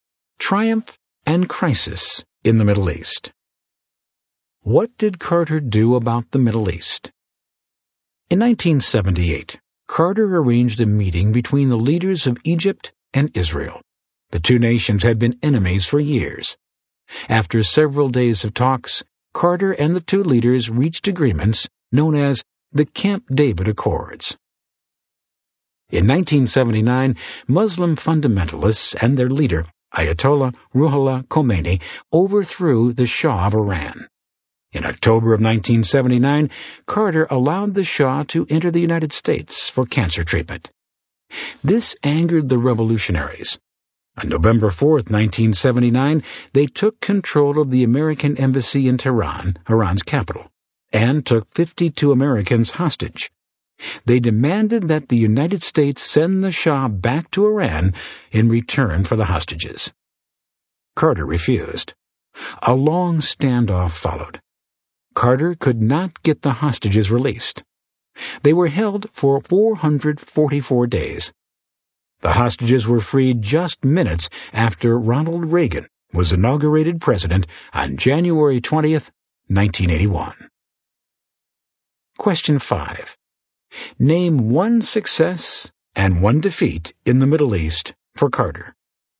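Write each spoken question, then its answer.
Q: Name one success and one defeat in the Middle East for Carter.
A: Success: Camp David Accords; defeat: Iran hostage crisis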